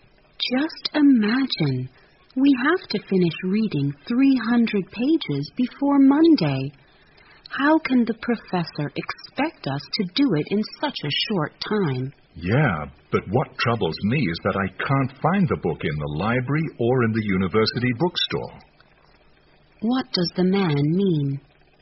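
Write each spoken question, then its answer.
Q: What does the man mean?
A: He is more worried that he can't find the book, in the library or the bookstore, than about the amount of reading.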